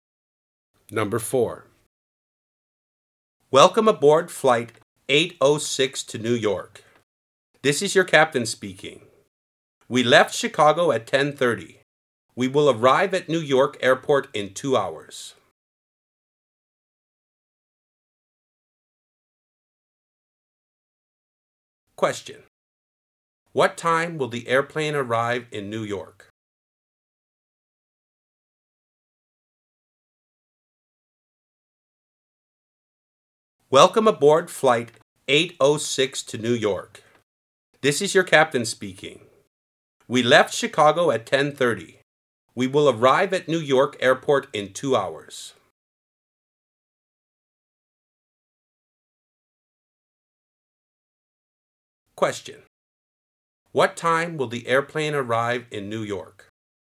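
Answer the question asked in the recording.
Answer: At 12:30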